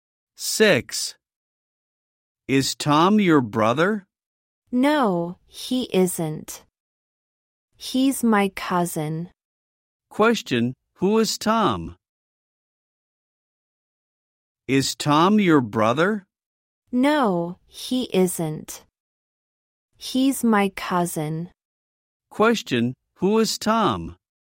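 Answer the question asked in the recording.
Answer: His cousin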